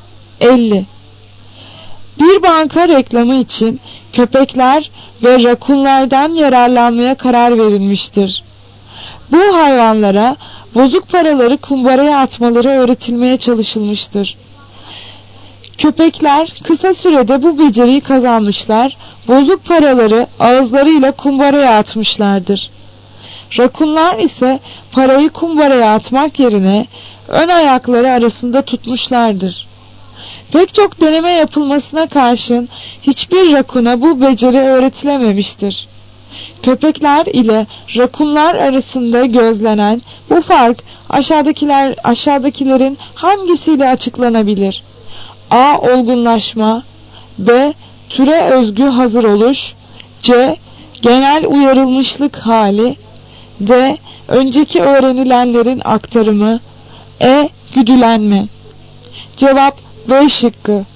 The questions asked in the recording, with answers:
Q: Köpekler ile rakunlar arasında gözlenen bu fark aşağıdakilerin hangisiyle açıklanabilir?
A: Cevap B şıkkı. Türe özgü hazır oluş.